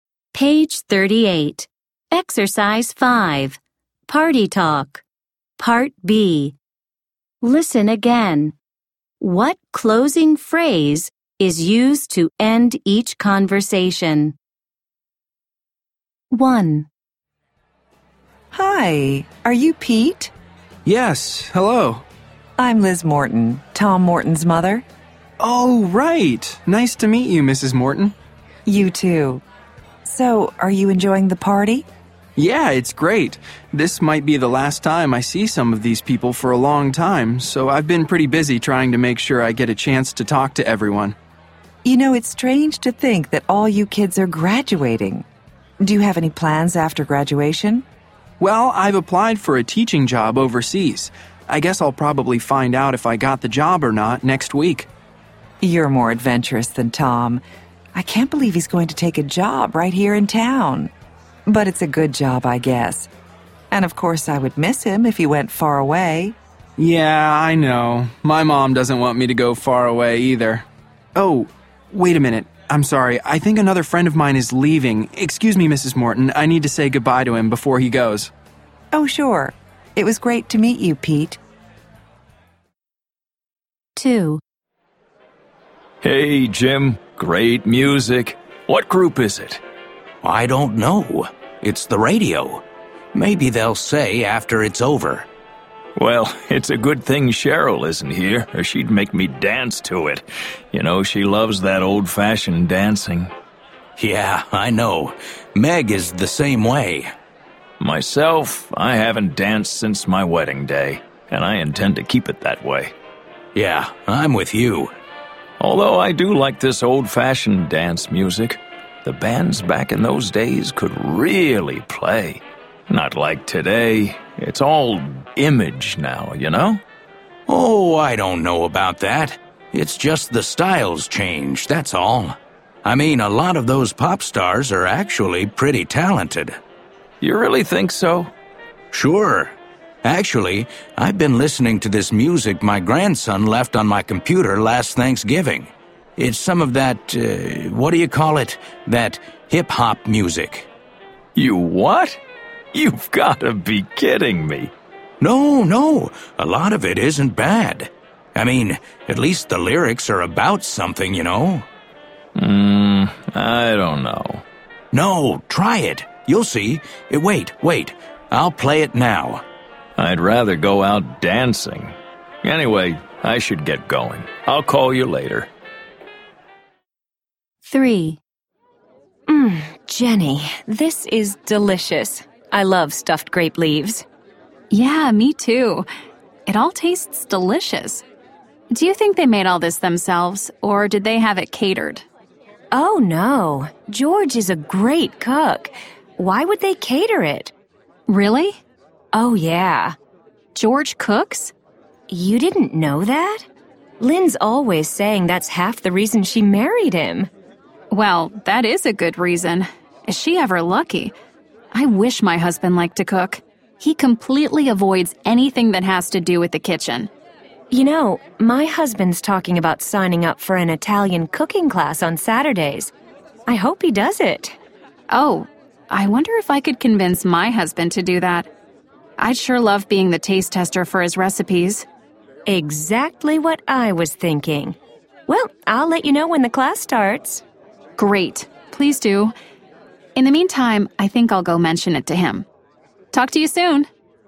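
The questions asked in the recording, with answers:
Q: What closing phrase is used to end each conversation?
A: Anyway, I should get going. I'll call you later.

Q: What closing phrase is used to end each conversation?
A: Talk to you soon.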